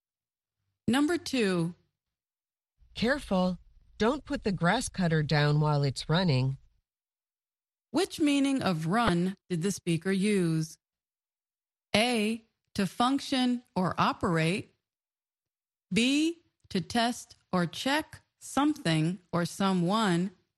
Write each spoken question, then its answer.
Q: Which meaning of run did the speaker use?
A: The answer is A. To function or operate.